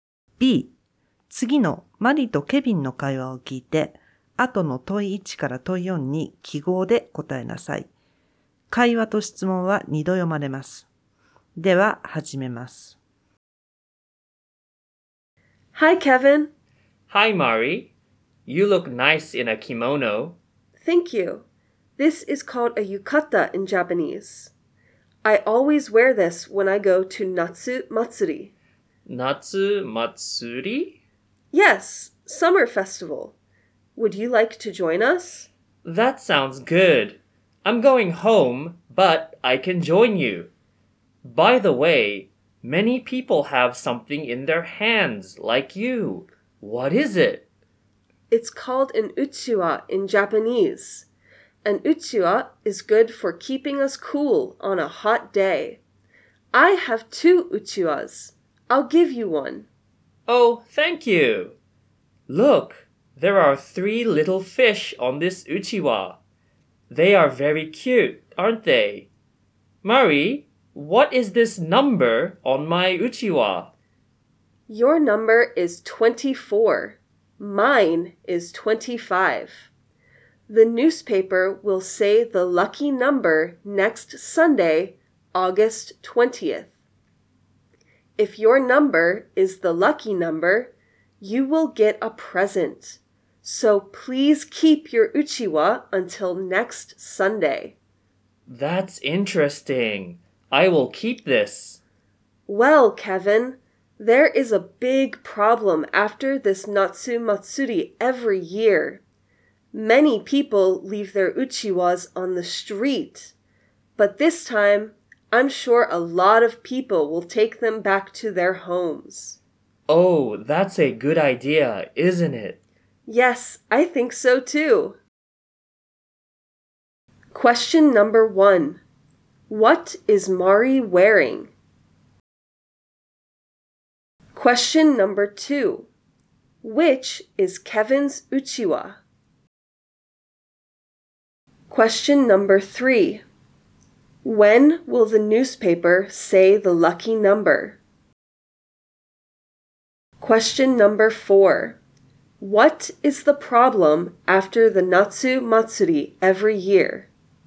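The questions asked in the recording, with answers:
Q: What is Mari wearing?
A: A yukata

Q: When will the newspaper say the lucky number?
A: Next Sunday, August 20th

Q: What is the problem after the Natsu Matsuri every year?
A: Many people leave their uchiwas on the street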